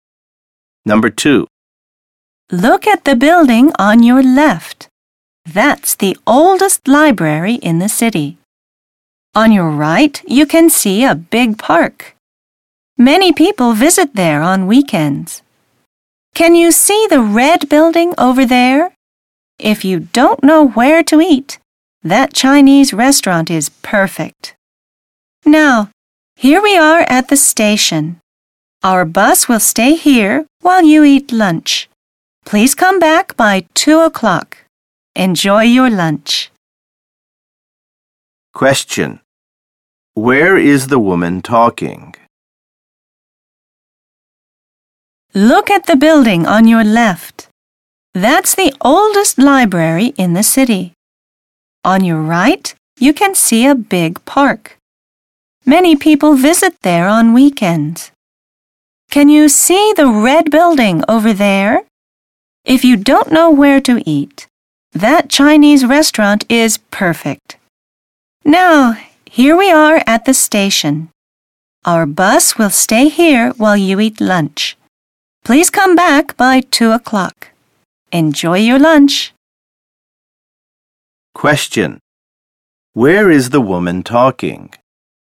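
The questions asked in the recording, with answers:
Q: Where is the woman talking?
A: On a (tour) bus at the station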